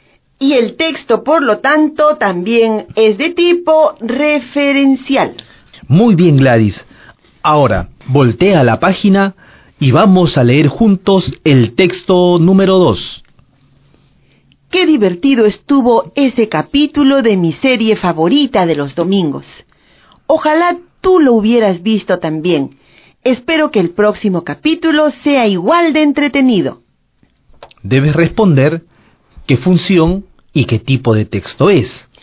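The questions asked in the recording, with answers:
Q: Debes responder qué función y qué tipo de texto es.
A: Función emotiva; texto emotivo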